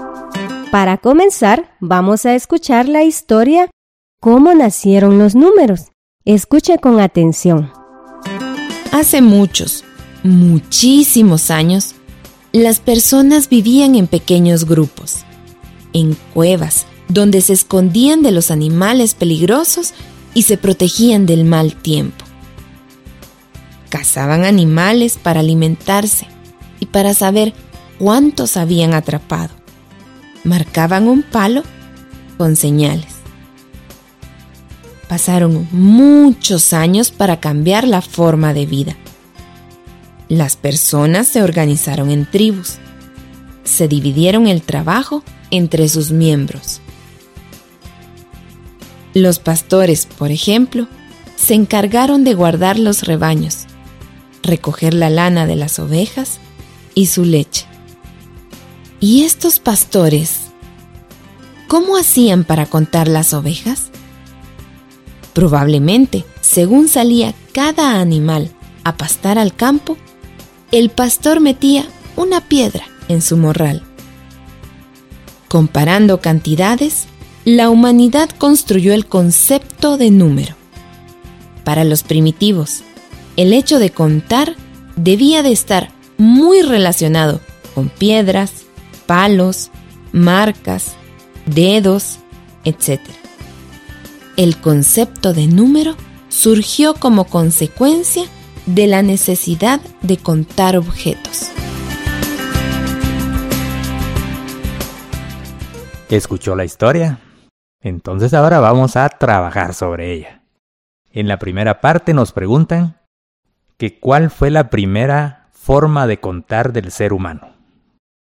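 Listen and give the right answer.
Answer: Marcando un palo con señales (marcas) para saber cuántos animales habían cazado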